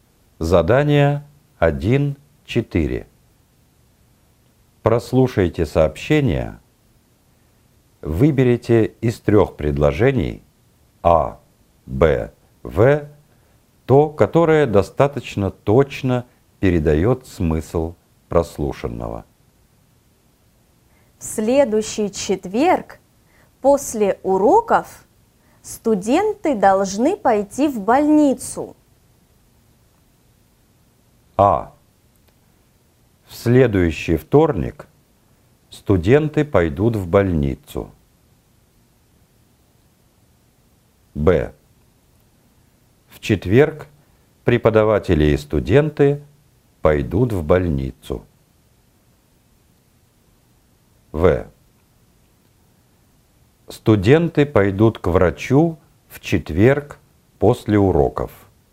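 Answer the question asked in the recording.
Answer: В: Студенты пойдут к врачу в четверг после уроков.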